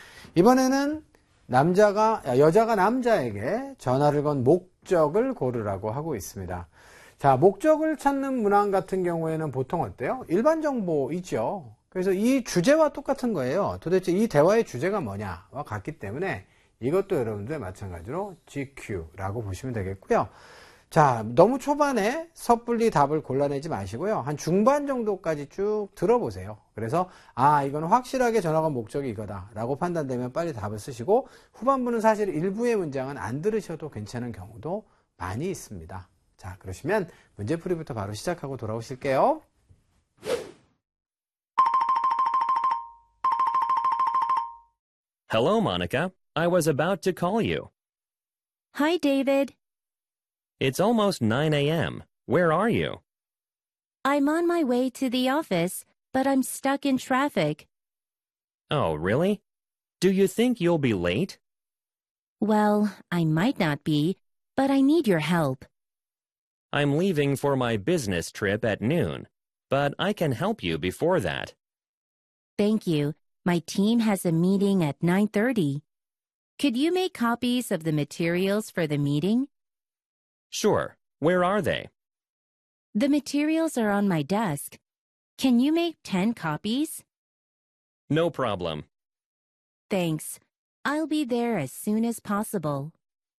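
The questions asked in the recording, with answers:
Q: 이번에는 여자가 남자에게 전화를 건 목적을 고르라고 하고 있습니다.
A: 회의 자료 10부를 복사해 달라고 부탁하려고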